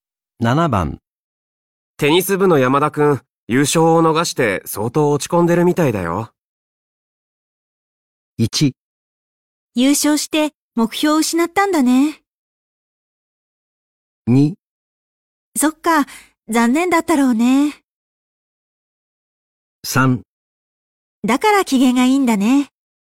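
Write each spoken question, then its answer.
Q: テニス部の山田くん、優勝を逃して相当落ち込んでるみたいだよ。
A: 2: そっか、残念だったろうね。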